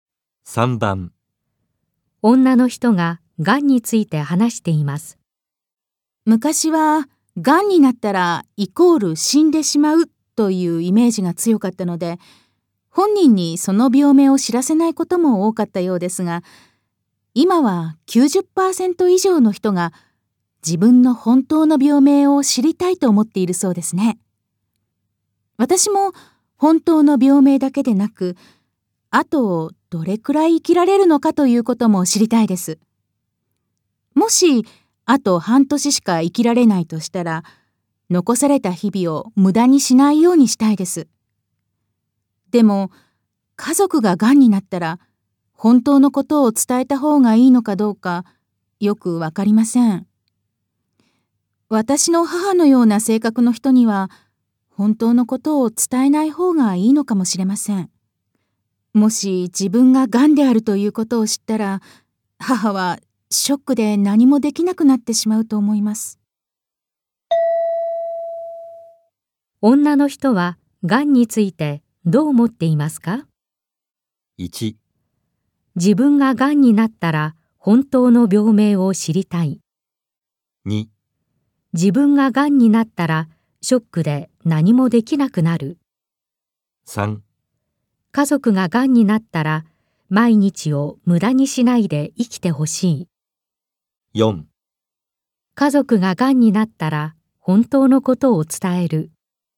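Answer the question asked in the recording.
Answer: 1: 自分が癌になったら本当の病名を知りたい。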